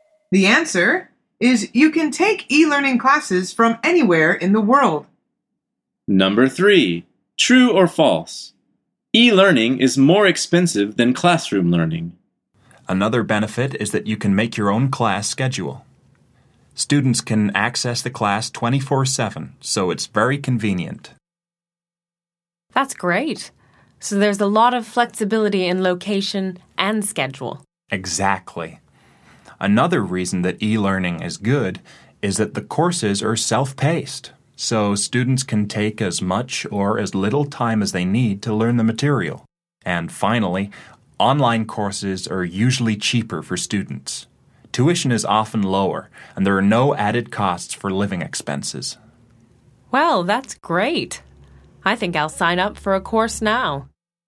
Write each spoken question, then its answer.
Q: True or false? E-learning is more expensive than classroom learning.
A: The answer is false.